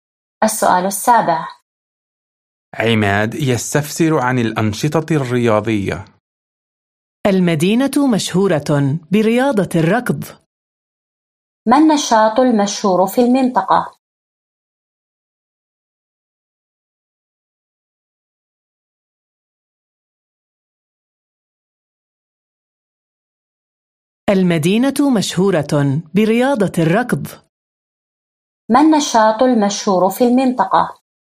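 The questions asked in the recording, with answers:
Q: ما النشاط المشهور في المنطقة؟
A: رياضة الركض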